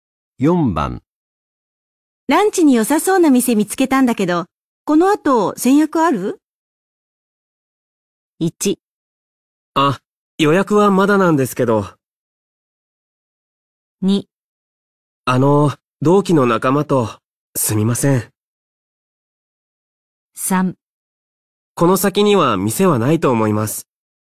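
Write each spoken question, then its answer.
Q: ランチに良さそうな店見つけたんだけど、この後先約ある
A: 2: あの、同期の仲間と、すみません。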